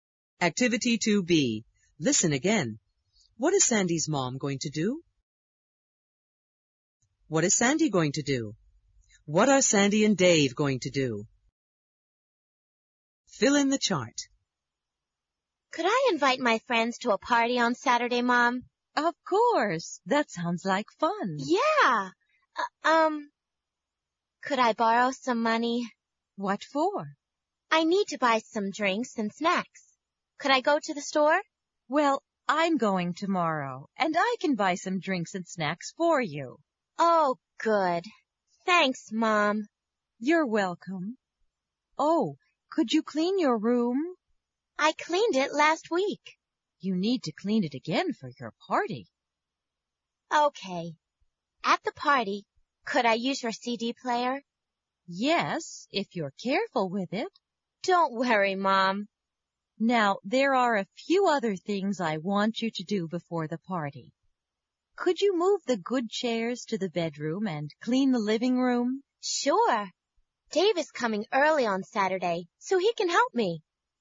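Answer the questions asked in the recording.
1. Go to the store and buy drinks and snacks
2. Clean her room
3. Move the good chairs to the bedroom and clean the living room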